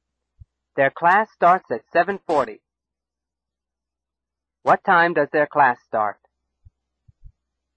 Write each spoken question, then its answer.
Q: What time does their class start?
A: 7:40. Their class starts at 7:40.